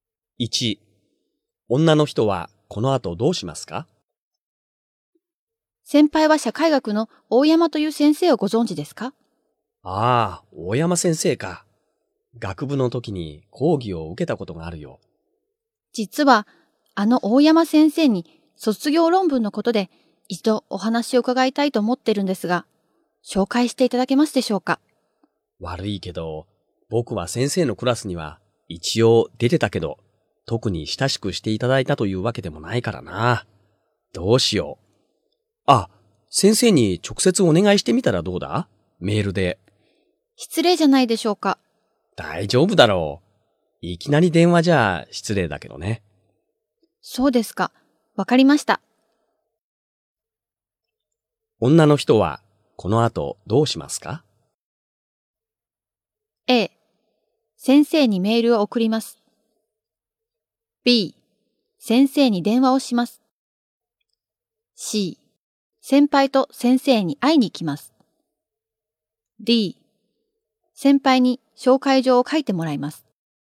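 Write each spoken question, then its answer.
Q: 女の人はこの後どうしますか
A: A: 先生にメールを送ります。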